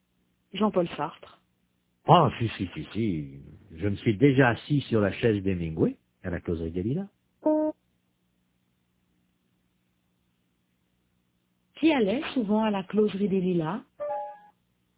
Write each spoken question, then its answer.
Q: Qui allait souvent à la Causerie des Lilas?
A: Hemingway.